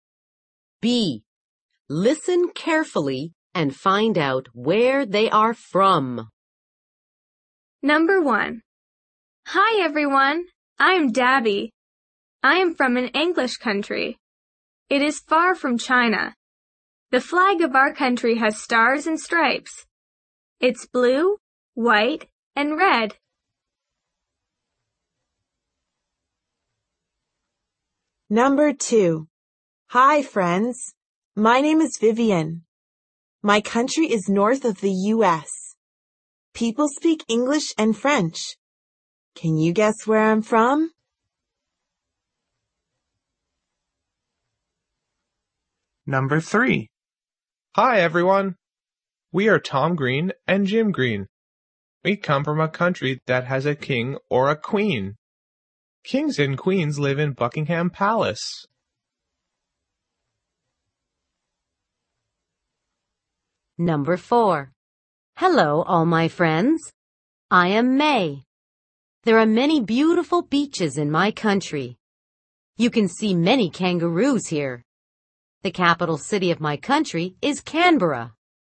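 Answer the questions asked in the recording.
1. the U.S.
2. Canada
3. the U.K.
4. Australia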